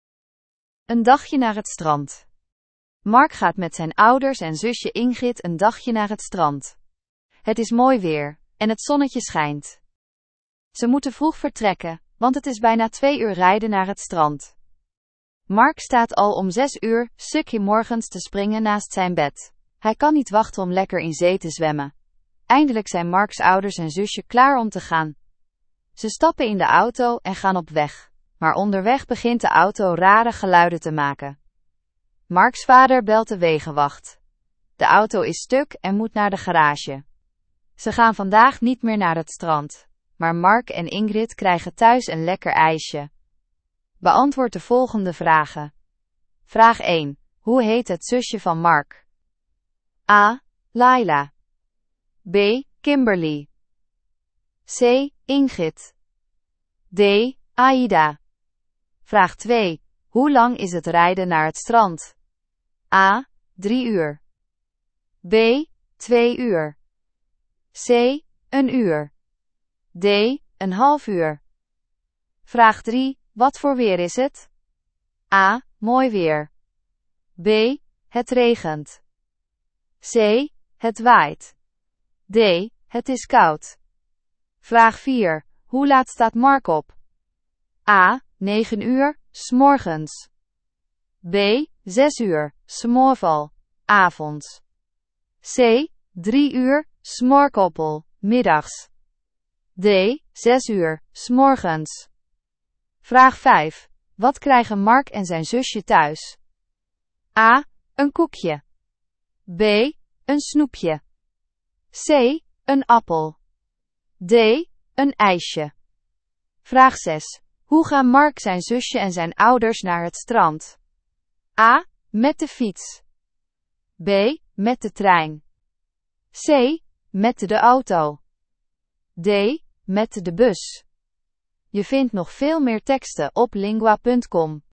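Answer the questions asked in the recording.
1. C: Ingrid
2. B: 2 uur
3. A: Mooi weer
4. D: 6 uur, 's morgens
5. D: Een ijsje
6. C: Met de auto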